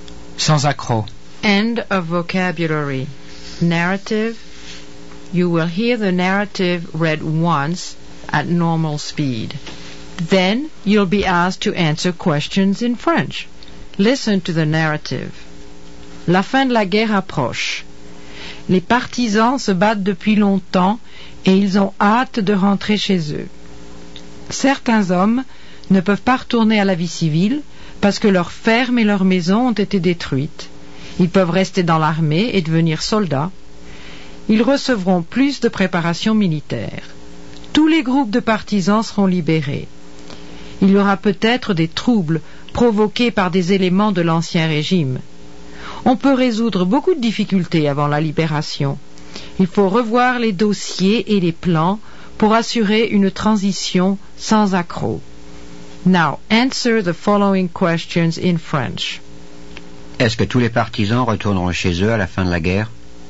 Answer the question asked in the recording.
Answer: Non, tous les partisans ne pourront pas retourner chez eux.